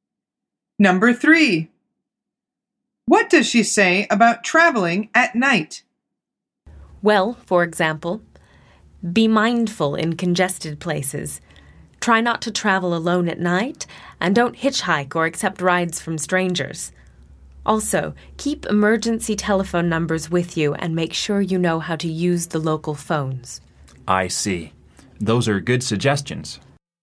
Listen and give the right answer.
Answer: The answer is to try not to travel alone.